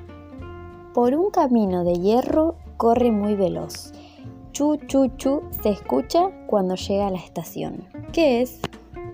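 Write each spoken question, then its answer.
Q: ¿Qué es?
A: el tren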